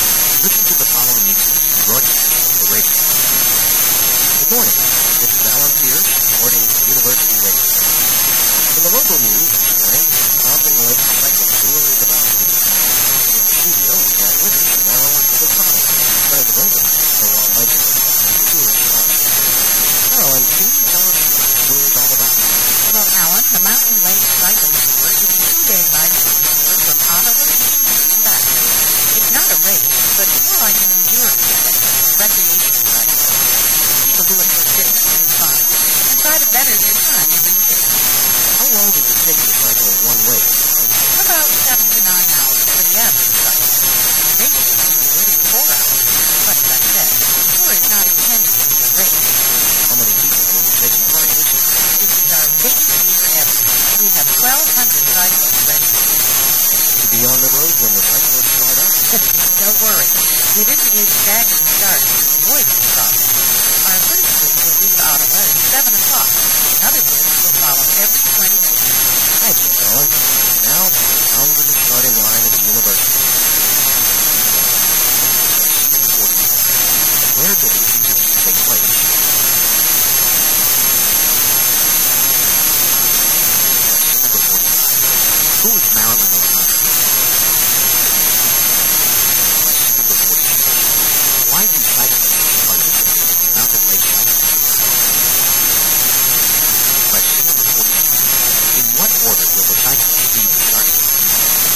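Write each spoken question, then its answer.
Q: Where does this interview take place?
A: In a university radio studio

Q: Who is Marilyn O'Connell?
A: President of the tour sponsor

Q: Why do cyclists participate in the Mountain Lake Cycling Tour?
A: For fitness and fun

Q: In what order will the cyclists be the starting line?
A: In groups, one leaving every 20 minutes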